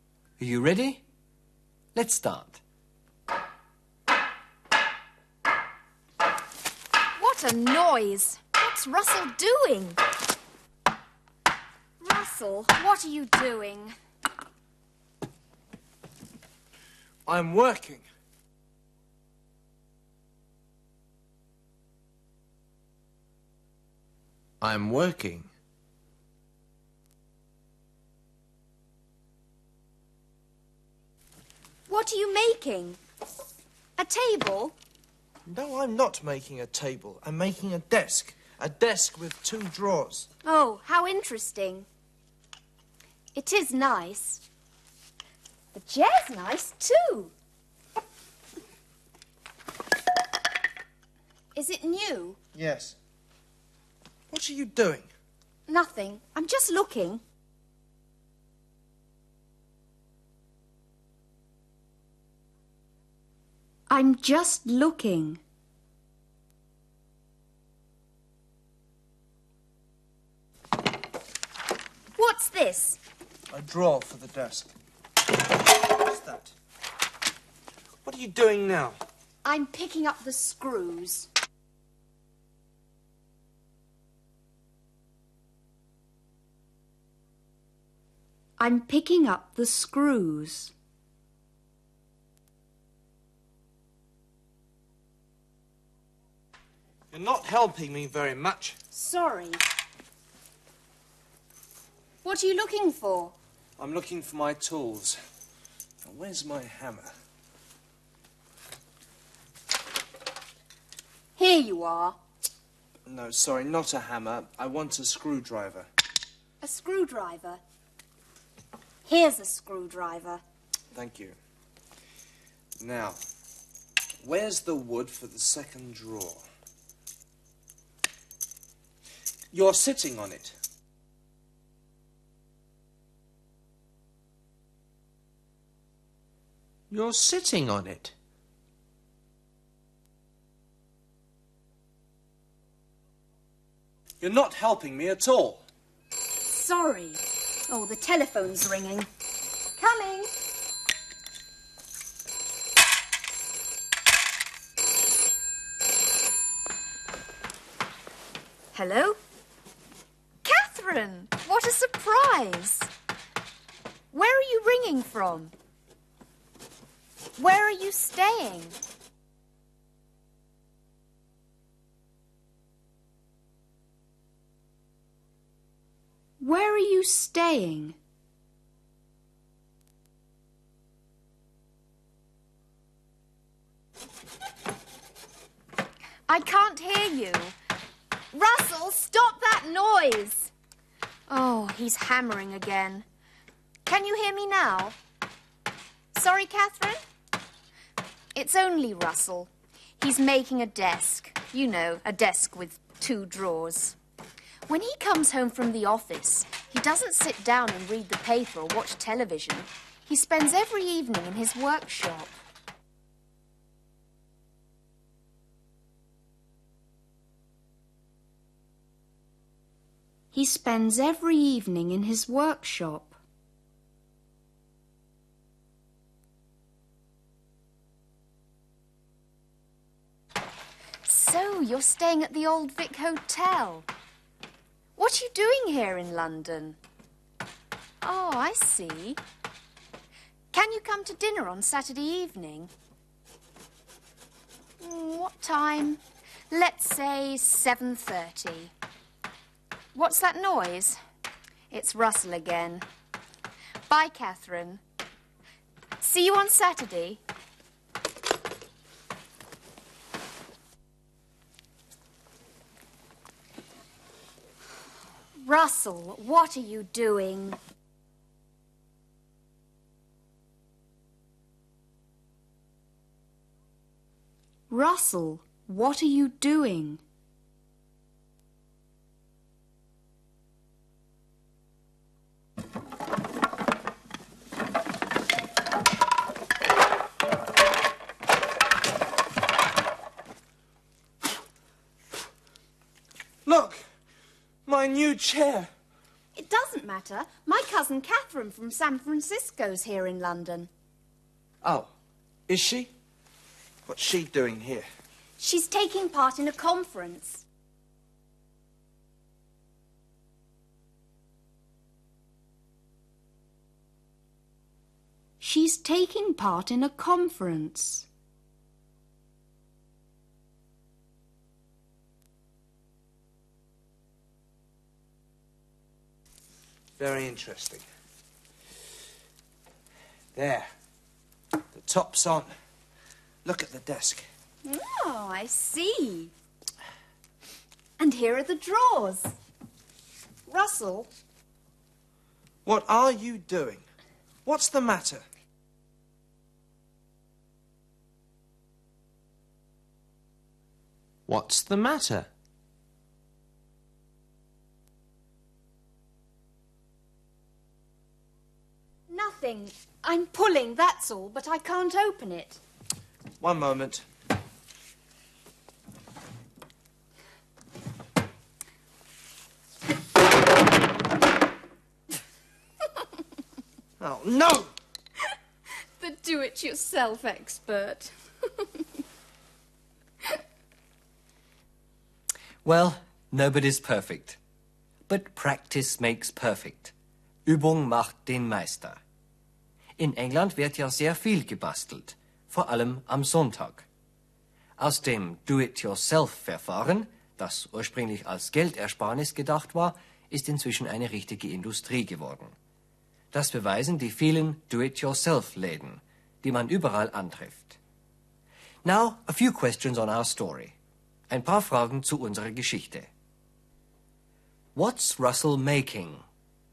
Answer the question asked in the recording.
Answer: He's making a desk.